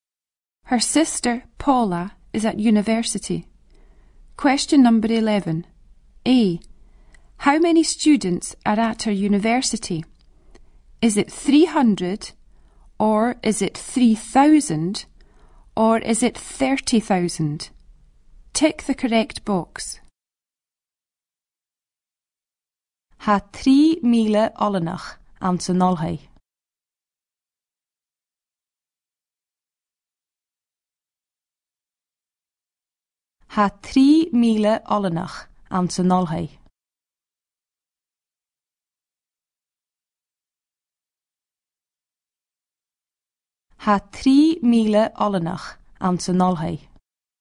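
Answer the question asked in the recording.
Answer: 3,000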